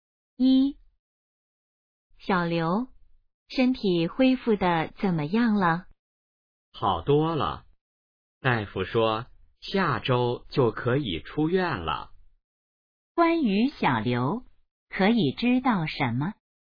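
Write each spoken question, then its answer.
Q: 关于小刘,可以知道什么?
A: 身体好多了,下周可以出院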